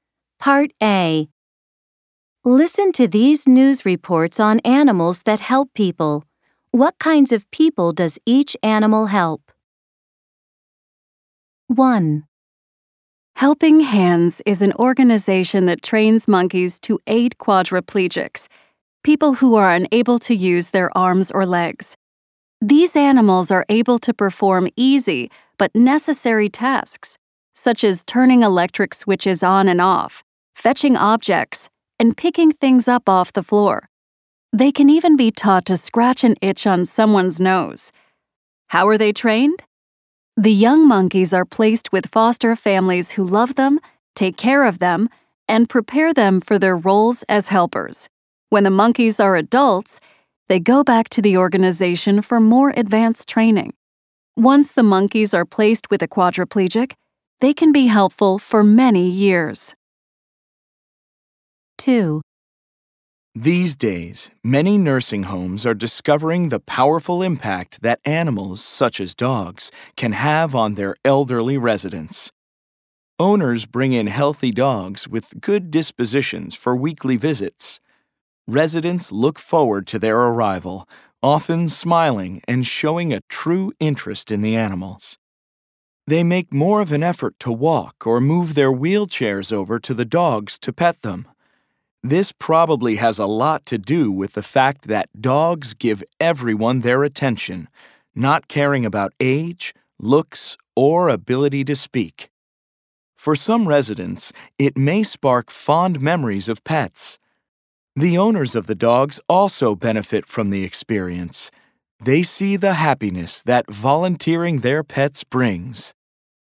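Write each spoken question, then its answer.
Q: What kinds of people does each animal help?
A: Monkeys help quadriplegics, people who can't use their arms or legs

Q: What kinds of people does each animal help?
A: Dogs help elderly residents of nursing homes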